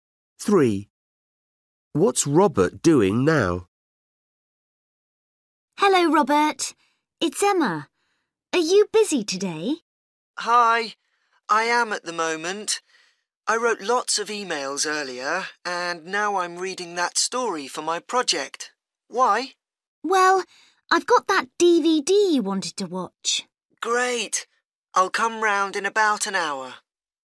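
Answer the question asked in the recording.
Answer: Reading a story for his project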